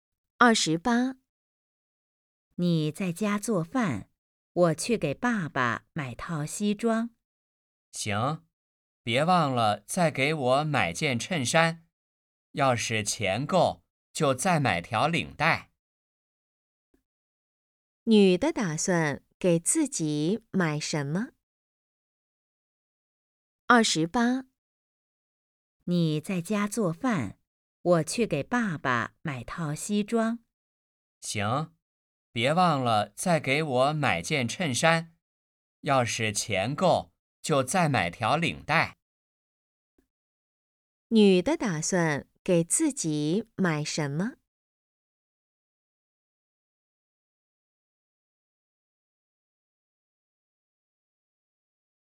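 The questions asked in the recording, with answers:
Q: 女的打算给自己买什么?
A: 衬衫(钱够的话再买领带)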